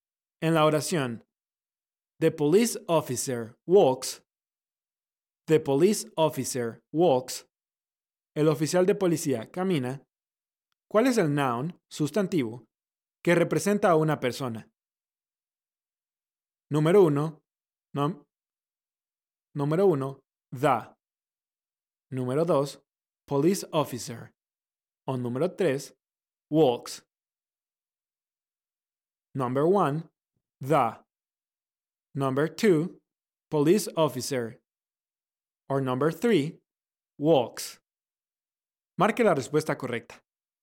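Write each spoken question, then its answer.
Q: ¿Cuál es el noun, sustantivo, que representa a una persona?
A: 2: police officer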